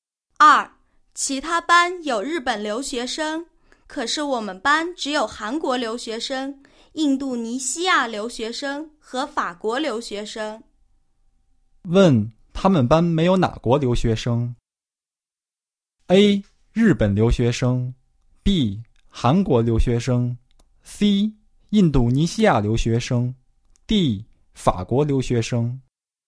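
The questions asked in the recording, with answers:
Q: 问,他们班没有哪国留学生?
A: A: 日本留学生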